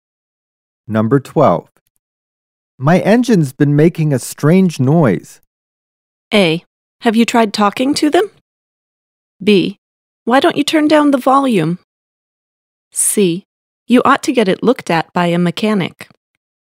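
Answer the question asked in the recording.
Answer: C: You ought to get it looked at by a mechanic.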